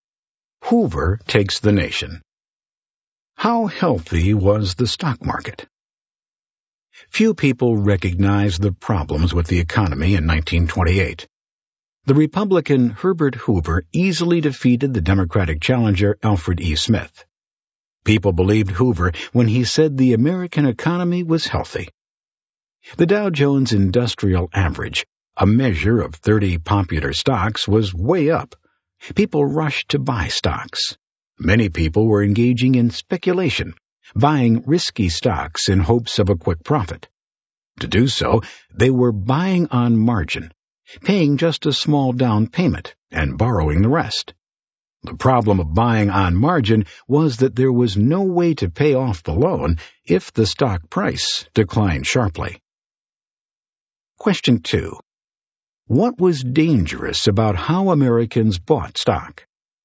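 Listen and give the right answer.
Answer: They bought risky stocks on margin with borrowed money and couldn't repay if prices fell sharply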